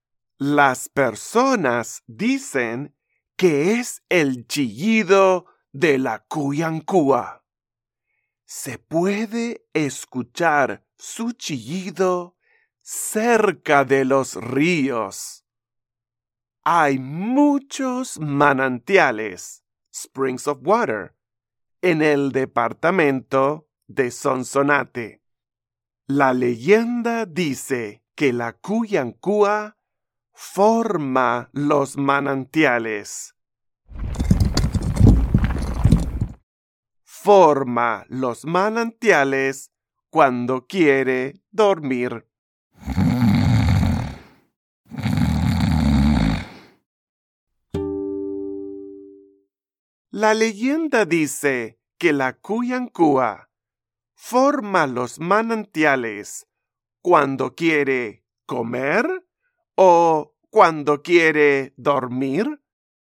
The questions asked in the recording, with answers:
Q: La leyenda dice que la Cuyancúa forma los manantiales cuando quiere comer o cuando quiere dormir.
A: Sí, tienes razón. La leyenda dice que la Cuyancúa forma los manantiales cuando quiere dormir.